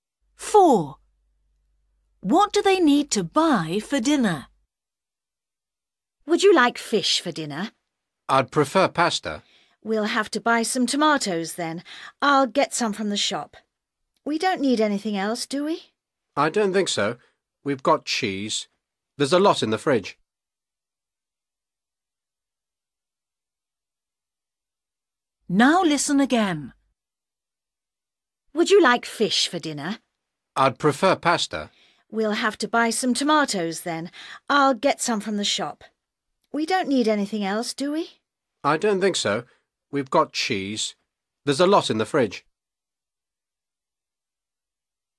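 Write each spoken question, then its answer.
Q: What do they need to buy for dinner?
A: tomatoes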